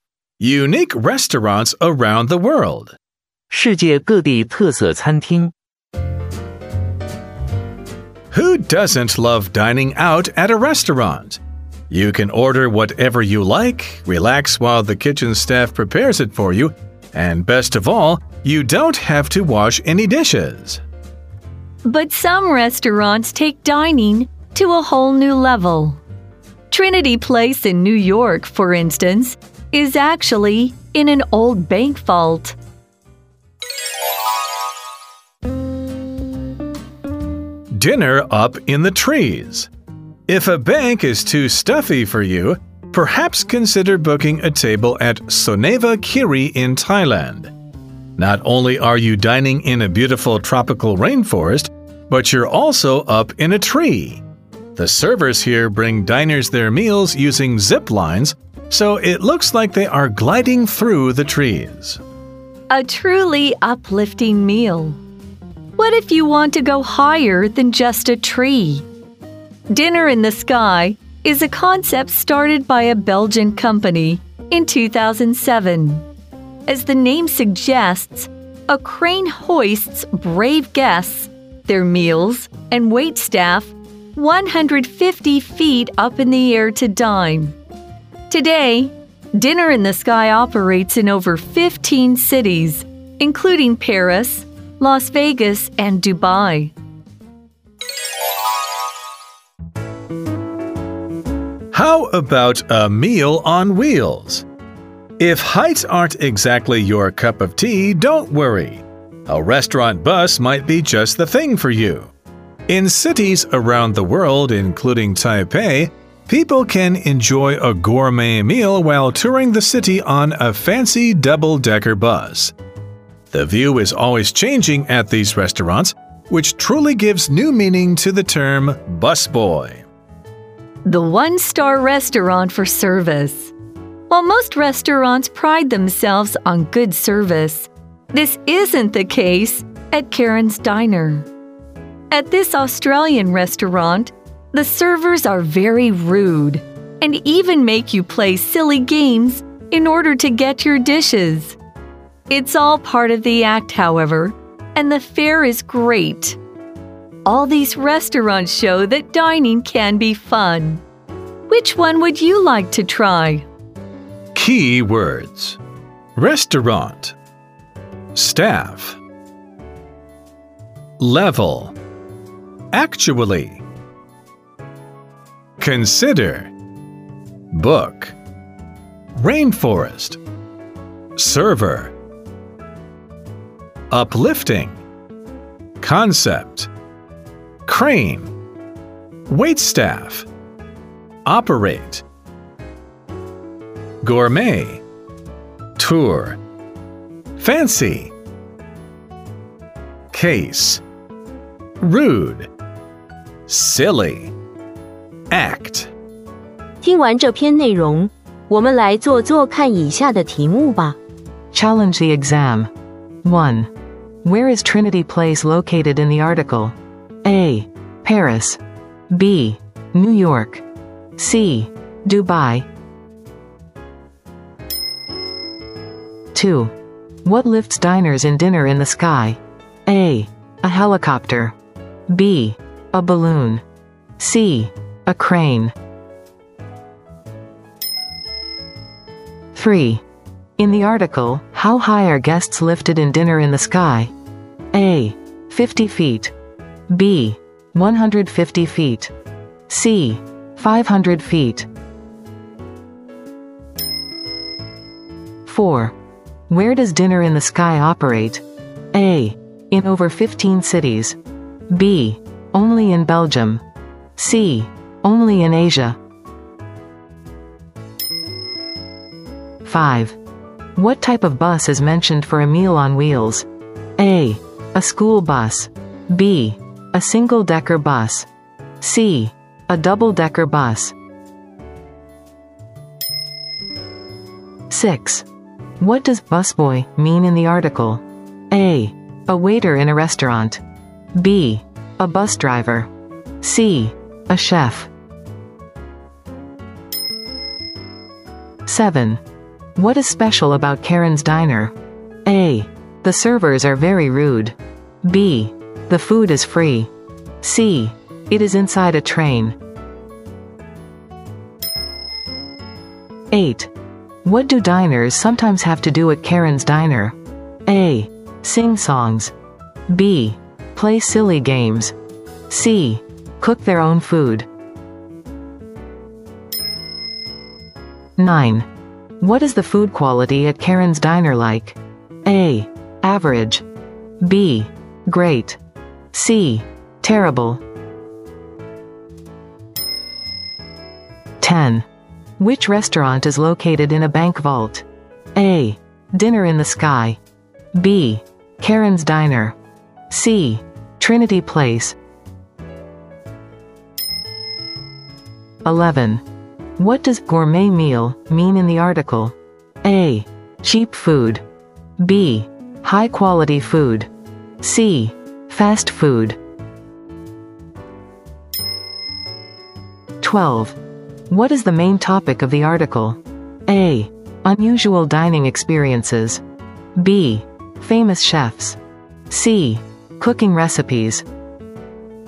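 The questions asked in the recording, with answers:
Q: Where is Trinity Place located in the article?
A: B: New York.

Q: What lifts diners in Dinner in the Sky?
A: C: A crane.

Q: In the article, how high are guests lifted in Dinner in the Sky?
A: B: 150 feet.

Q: Where does Dinner in the Sky operate?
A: A: In over 15 cities.

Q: What type of bus is mentioned for a meal on wheels?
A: C: A double-decker bus.

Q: What does busboy mean in the article?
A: A: A waiter in a restaurant.

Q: What is special about Karen's Diner?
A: A: The servers are very rude.

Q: What do diners sometimes have to do at Karen's Diner?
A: B: Play silly games.

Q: What is the food quality at Karen's Diner like?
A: B: Great.

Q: Which restaurant is located in a bank vault?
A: C: Trinity Place.

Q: What does gourmet meal mean in the article?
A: B: High quality food.

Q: What is the main topic of the article?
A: A: Unusual dining experiences.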